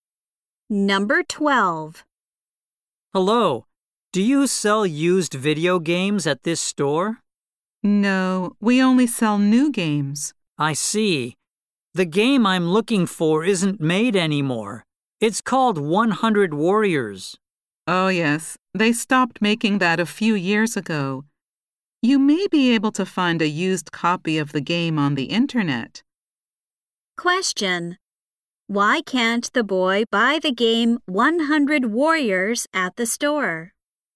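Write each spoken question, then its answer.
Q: Why can't the boy buy the game 100 Warriors at the store?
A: The store only sells new games, and the game isn't made anymore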